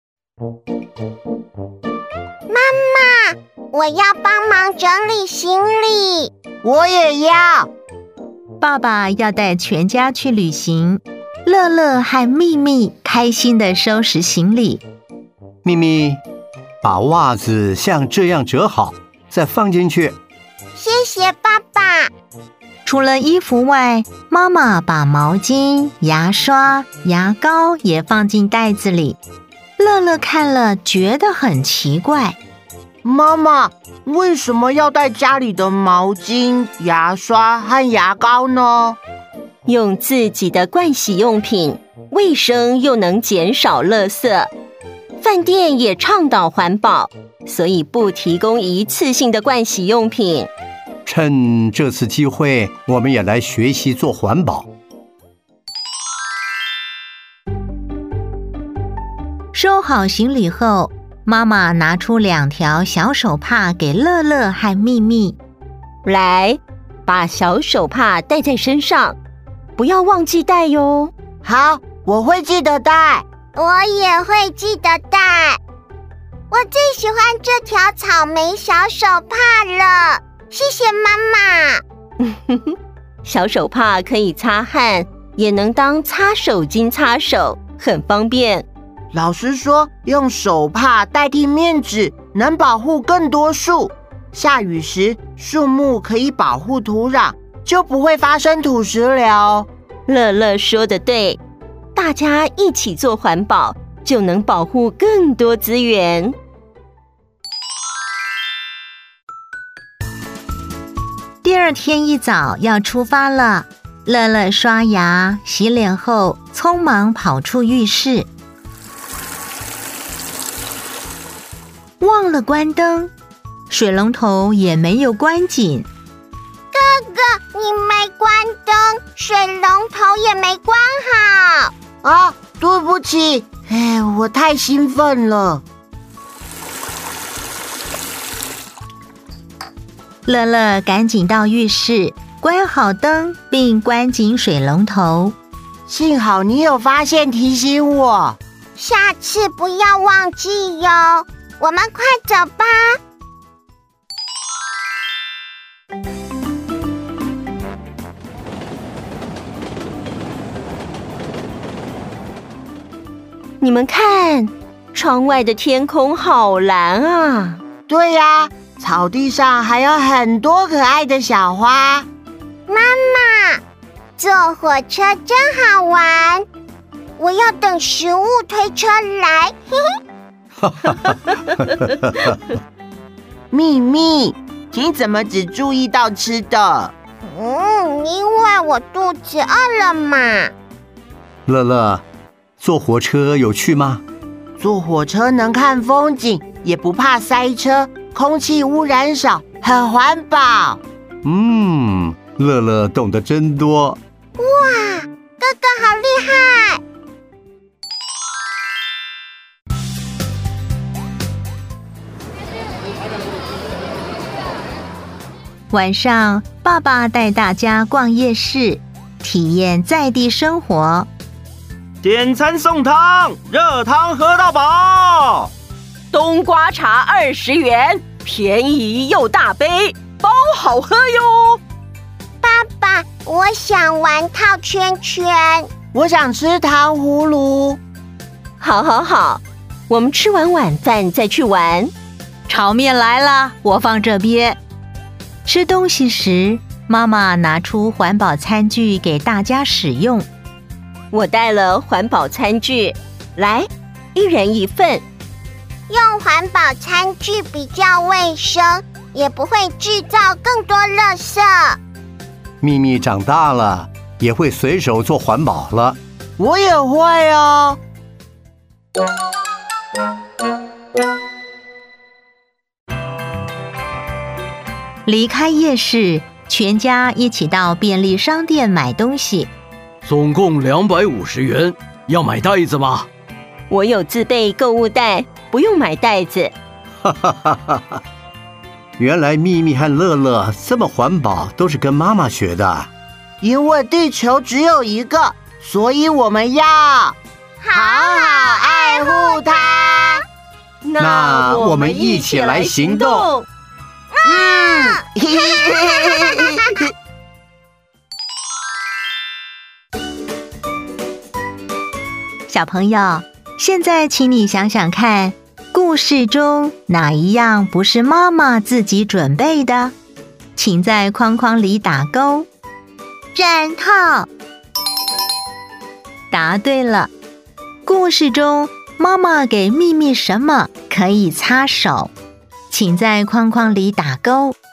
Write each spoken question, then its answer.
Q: 故事中妈妈给咪咪什么可以擦手?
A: 小手帕。